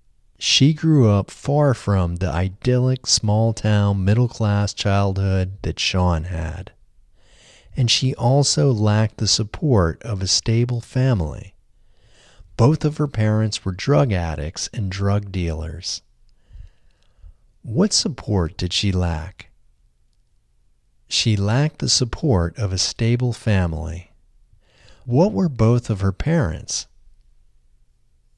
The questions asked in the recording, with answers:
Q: What were both of her parents?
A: Both of her parents were drug addicts and drug dealers.